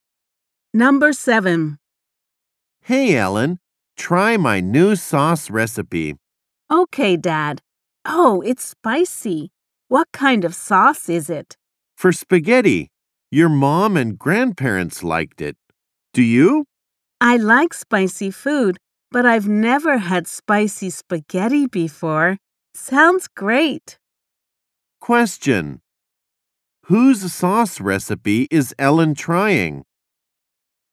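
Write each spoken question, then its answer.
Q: Whose sauce recipe is Ellen trying?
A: Her dad's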